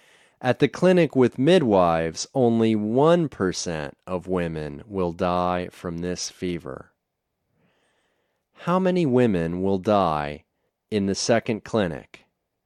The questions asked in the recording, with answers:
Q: How many women will die in the second clinic?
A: One % of women will die at the second clinic.